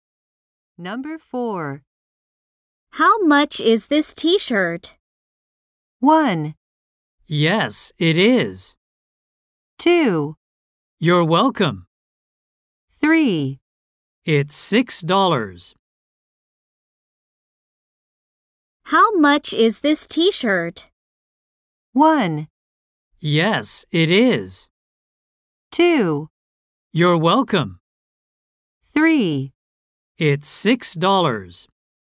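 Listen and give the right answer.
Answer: 3: It's $6.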